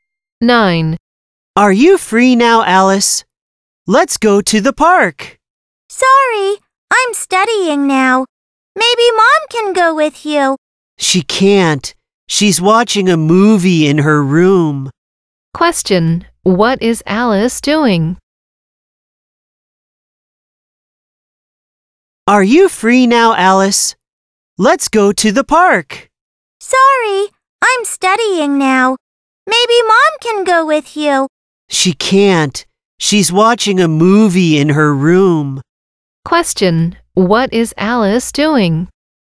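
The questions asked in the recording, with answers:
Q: What is Alice doing?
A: Studying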